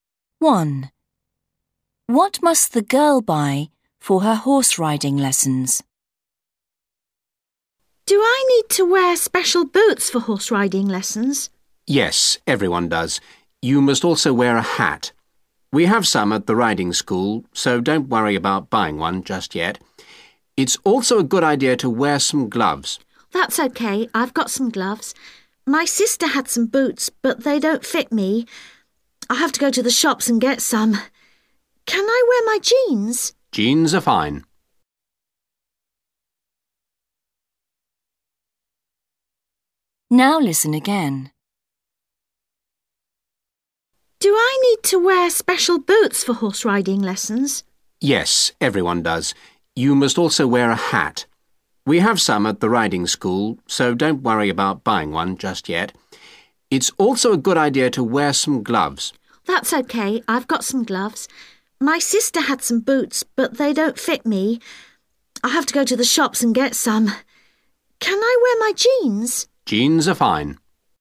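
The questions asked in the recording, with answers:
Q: What must the girl buy for her horse riding lessons?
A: boots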